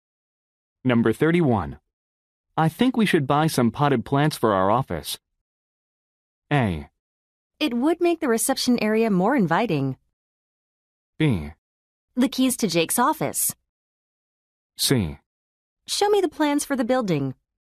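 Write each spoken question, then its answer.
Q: I think we should buy some potted plants for our office.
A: A: It would make the reception area more inviting.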